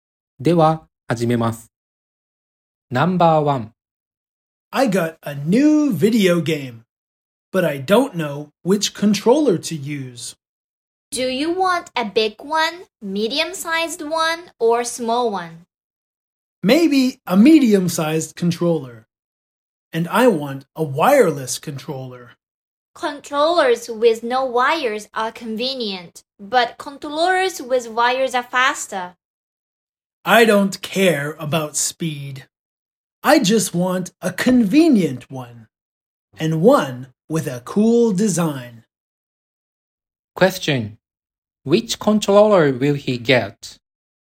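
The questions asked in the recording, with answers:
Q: Which controller will he get?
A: A medium-sized wireless controller with a cool design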